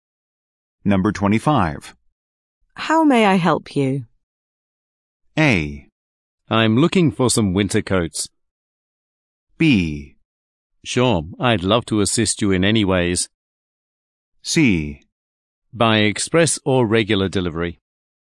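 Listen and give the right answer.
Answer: A: I'm looking for some winter coats.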